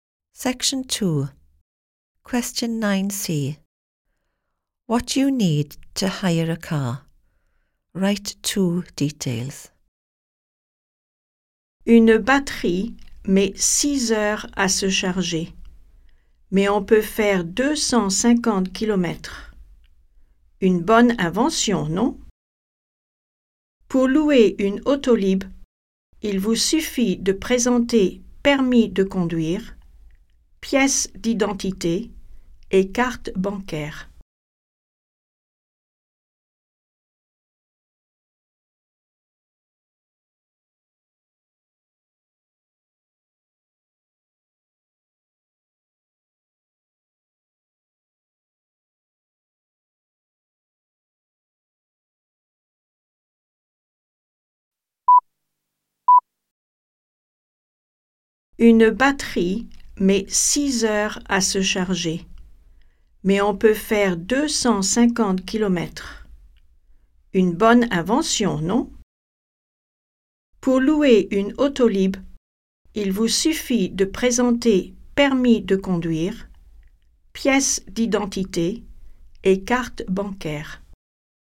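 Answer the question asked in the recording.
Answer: Driving licence, ID, bank card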